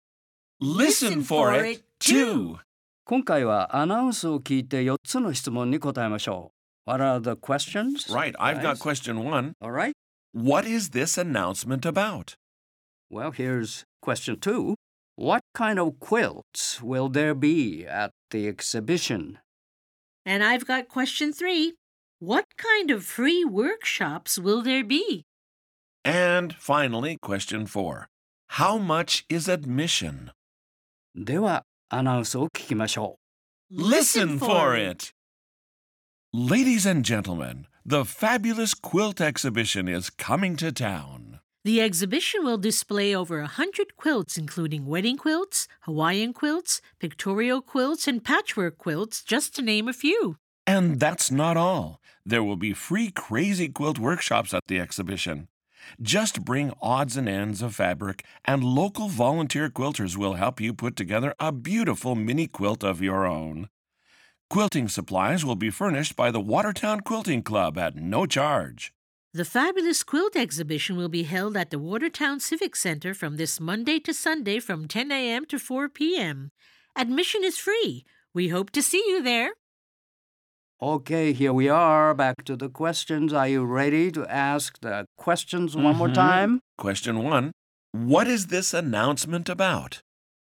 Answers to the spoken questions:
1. It's about the fabulous quilt exhibition that is coming to town.
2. Wedding quilts, Hawaiian quilts, pictorial quilts, and patchwork quilts, just to name a few.
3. Crazy quilt workshops.
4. It's free.